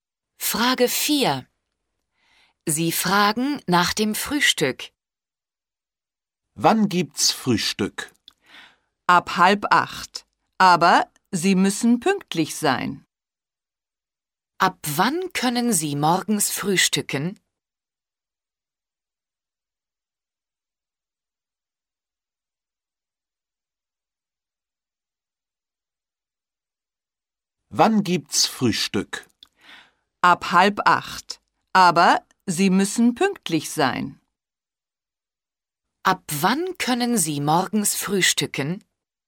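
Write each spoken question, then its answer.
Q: Ab wann können Sie morgens frühstücken?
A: Ab 7:30 Uhr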